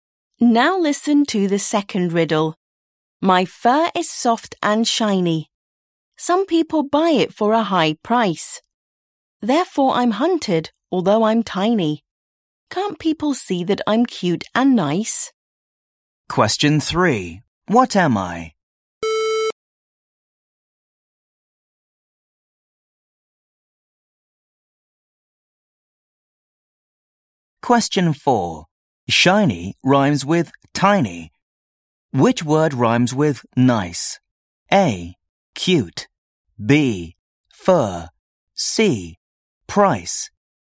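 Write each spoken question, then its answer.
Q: Which word rhymes with nice?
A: C: Price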